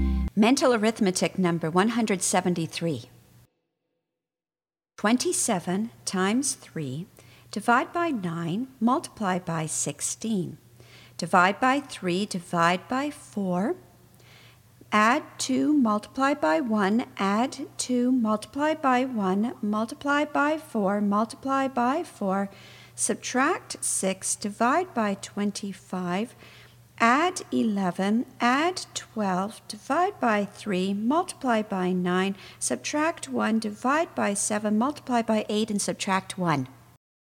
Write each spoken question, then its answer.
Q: 27 times 3, divide by 9, multiply by 16. Divide by 3, divide by 4. Add 2, multiply by 1, add 2, multiply by 1, multiply by 4, multiply by 4. Subtract 6, divide by 25. Add 11, add 12, divide by 3, multiply by 9, subtract 1, divide by 7, multiply by 8, and subtract 1.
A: And the answer is 111.